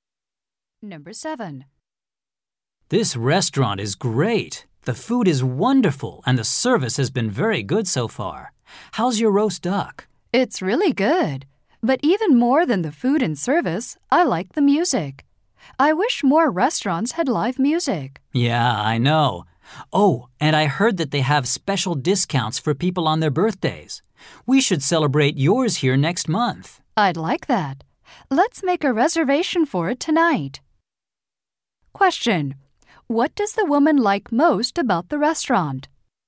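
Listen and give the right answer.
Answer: The live music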